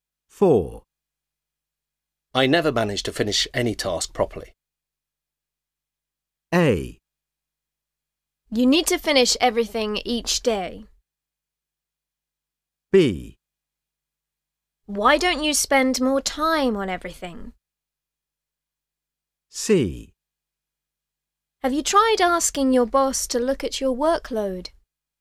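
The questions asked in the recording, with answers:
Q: I never manage to finish any task properly.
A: C: Have you tried asking your boss to look at your workload?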